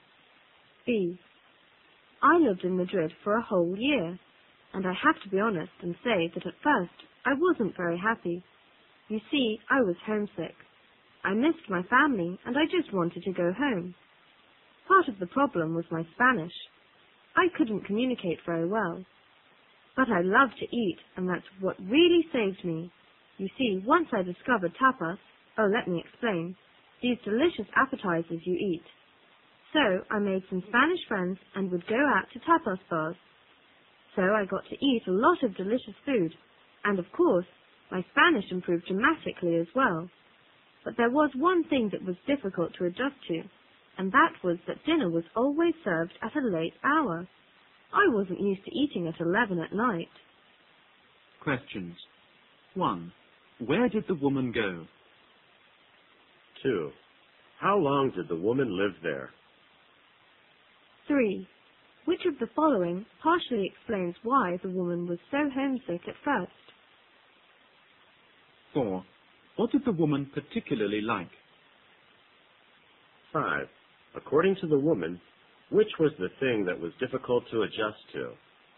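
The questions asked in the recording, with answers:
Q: Where did the woman go?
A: Madrid

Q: How long did the woman live there?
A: A whole year

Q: What did the woman particularly like?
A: Eating, especially tapas

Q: According to the woman, which was the thing that was difficult to adjust to?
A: Dinner being served very late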